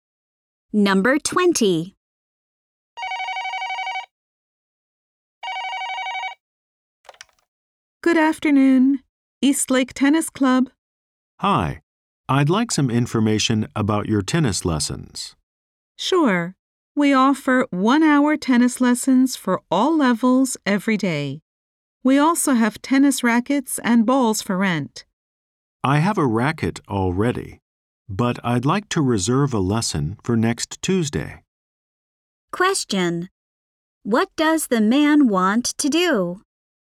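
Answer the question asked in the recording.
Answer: Reserve a tennis lesson for next Tuesday.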